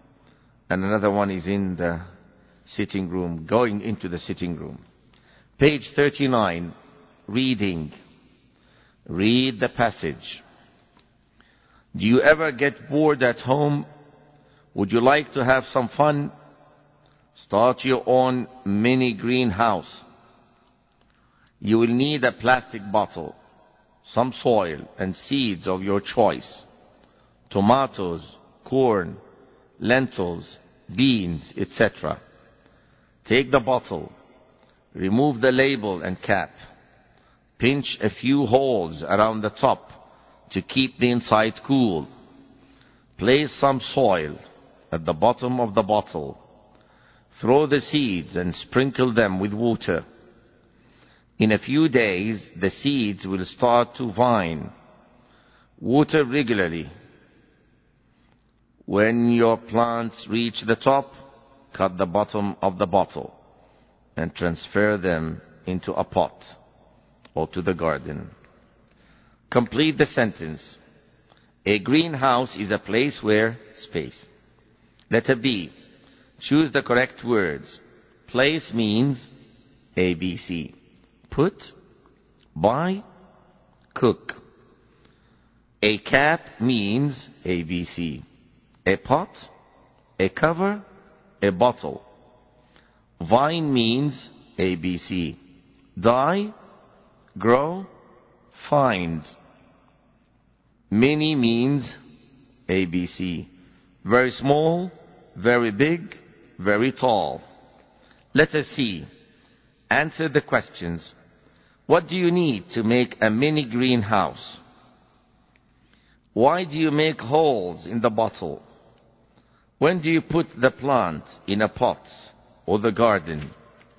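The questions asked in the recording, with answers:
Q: Place means A, B, C. Put, buy, cook.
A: A: Put

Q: A cap means A, B, C. A pot, a cover, a bottle.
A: B: a cover

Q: Vine means A, B, C. Die, grow, find.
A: B: grow

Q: Mini means A, B, C. Very small, very big, very tall.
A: A: Very small

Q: What do you need to make a mini greenhouse?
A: A plastic bottle, some soil and seeds

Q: Why do you make holes in the bottle?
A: To keep the inside cool

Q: When do you put the plant in a pot or the garden?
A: When the plants reach the top of the bottle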